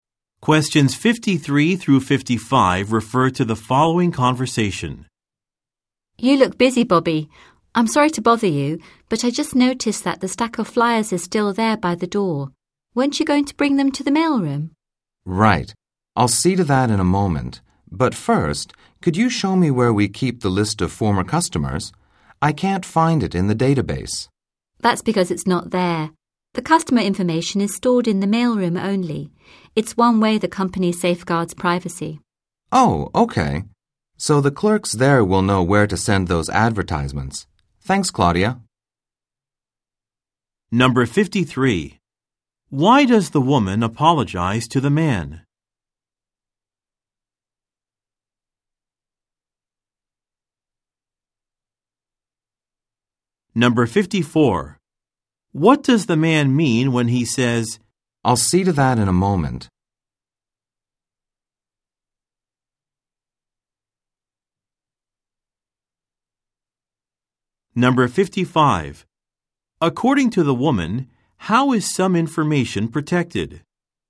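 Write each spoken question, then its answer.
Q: Why does the woman apologize to the man?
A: For interrupting him while he is busy

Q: What does the man mean when he says, I'll see to that in a moment?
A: He will take the flyers to the mailroom soon

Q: According to the woman, how is some information protected?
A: Customer information is kept only in the mailroom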